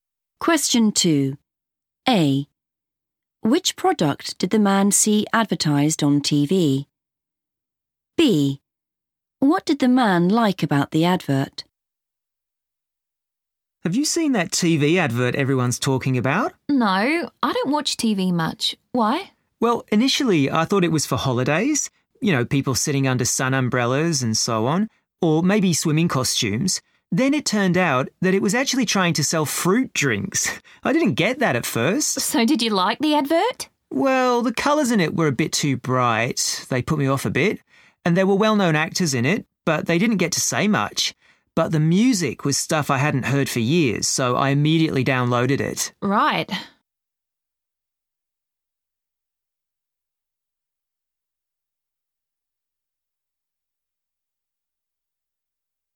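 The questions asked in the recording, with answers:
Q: Which product did the man see advertised on TV?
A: fruit drinks

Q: What did the man like about the advert?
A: the music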